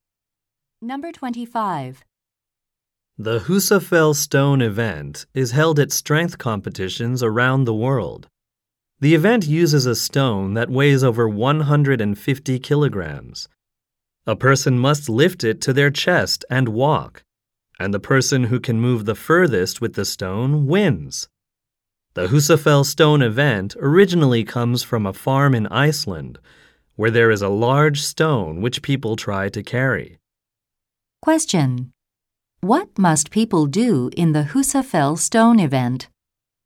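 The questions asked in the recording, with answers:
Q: What must people do in the Husafell Stone event?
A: Lift a heavy stone to their chest and walk as far as possible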